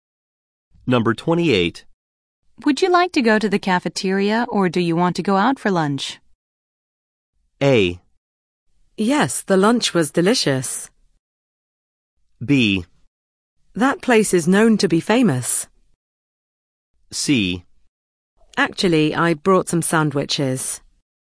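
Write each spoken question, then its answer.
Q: Would you like to go to the cafeteria or do you want to go out for lunch?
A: C: Actually, I brought some sandwiches.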